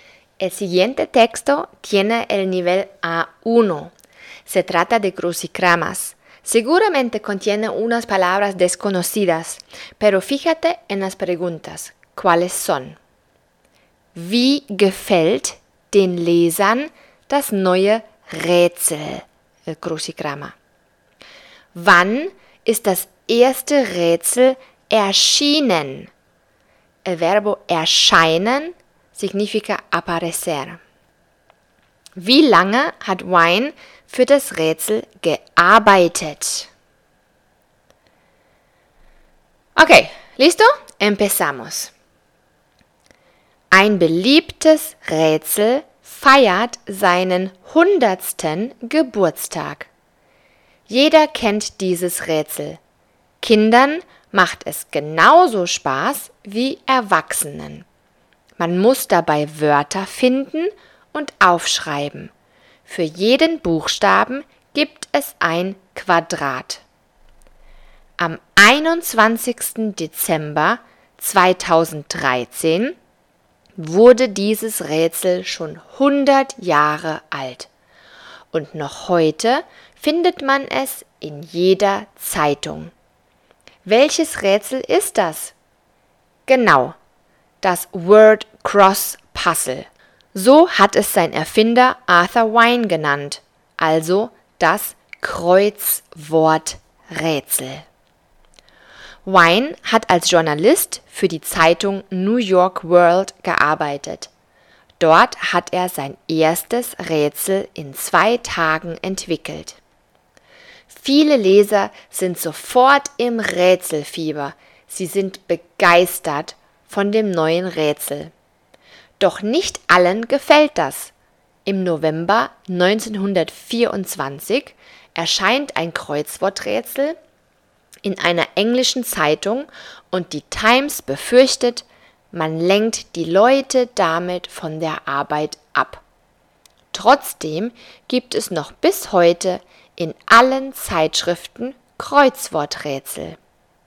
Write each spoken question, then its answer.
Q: Wie gefällt den Lesern das neue Rätsel?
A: Sie sind begeistert.

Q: Wann ist das erste Rätsel erschienen?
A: Am 21. Dezember 1913.

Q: Wie lange hat Wine für das Rätsel gearbeitet?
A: Zwei Tage.